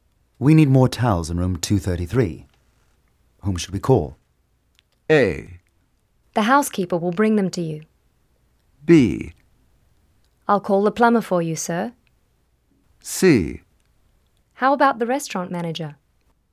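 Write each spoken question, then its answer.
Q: Whom should we call?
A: A: The housekeeper will bring them to you.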